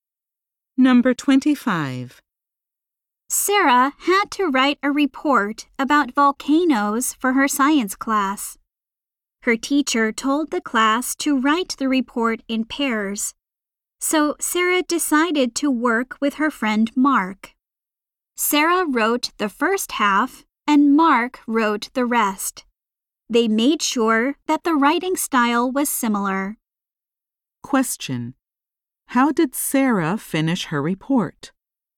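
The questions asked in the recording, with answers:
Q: How did Sarah finish her report?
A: She wrote it together with her friend Mark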